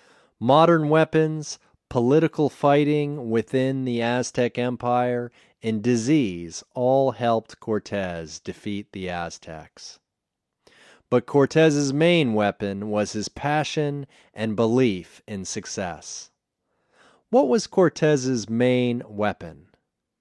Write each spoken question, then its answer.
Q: What was Cortez's main weapon?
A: Cortez's main weapon was his passion and his belief.